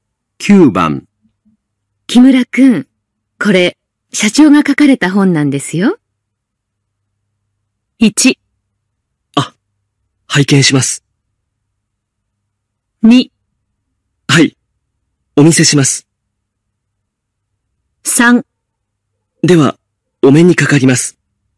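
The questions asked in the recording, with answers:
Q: 木村くん、これ、社長が書かれた本なんですよ。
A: 1: あ、拝見します。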